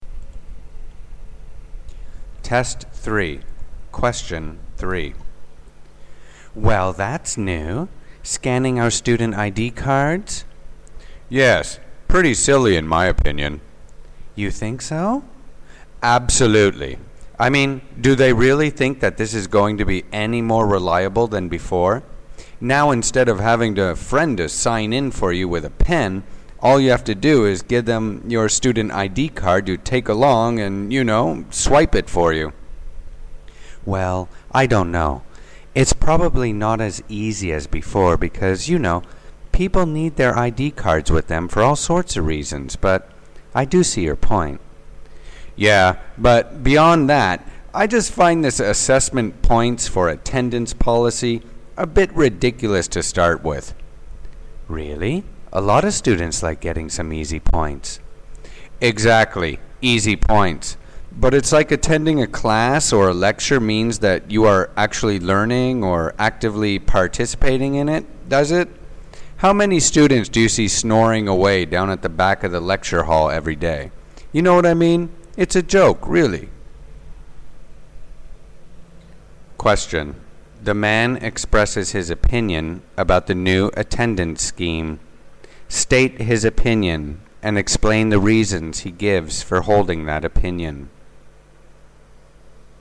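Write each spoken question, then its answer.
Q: The man expresses his opinion about the new attendance scheme. State his opinion and explain the reasons he gives for holding that opinion.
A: He thinks it is silly: a friend can still swipe your ID card for you, so it is no more reliable, and giving points for attendance is ridiculous because being there doesn't mean learning or taking part (students sleep at the back).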